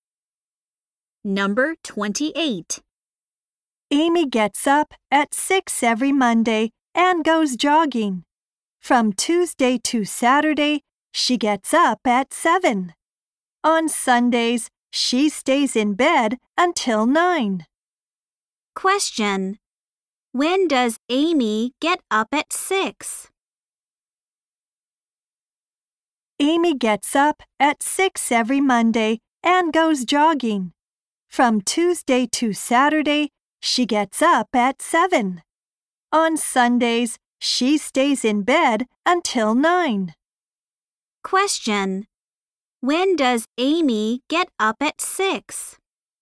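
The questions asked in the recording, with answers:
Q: when does Amy get up at 6?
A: Every Monday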